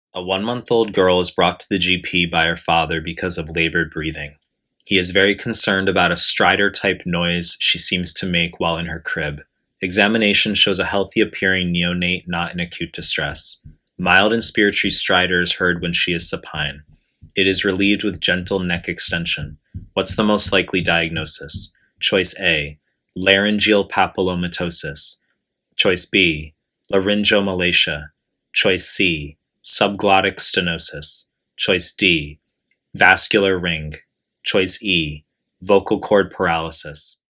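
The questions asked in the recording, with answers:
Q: What's the most likely diagnosis?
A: B: laryngomalacia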